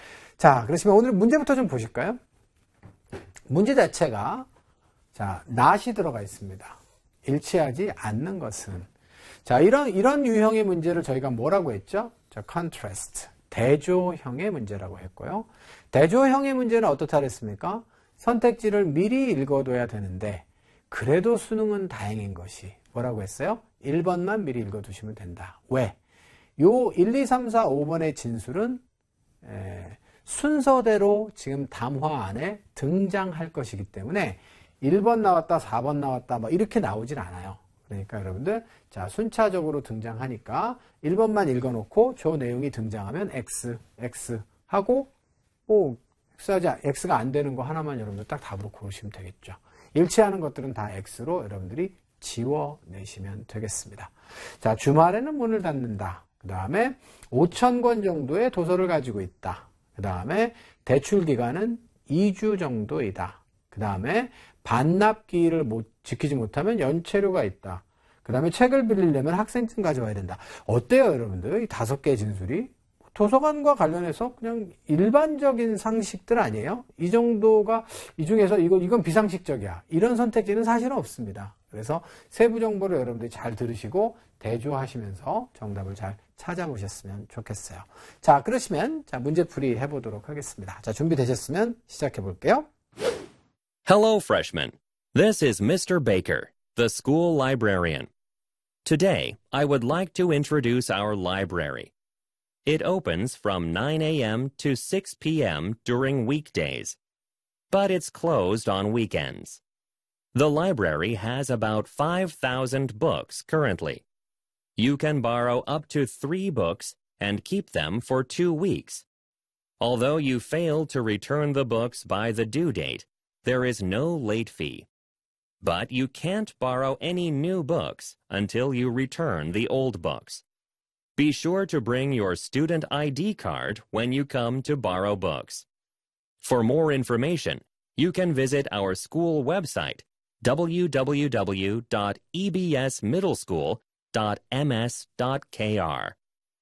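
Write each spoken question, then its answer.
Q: 일치하지 않는 것은.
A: 4: 반납기를 지키지 못하면 연체료가 있다.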